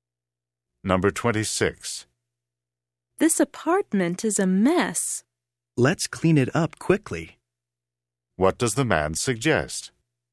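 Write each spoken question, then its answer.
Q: What does the man suggest?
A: Cleaning the apartment quickly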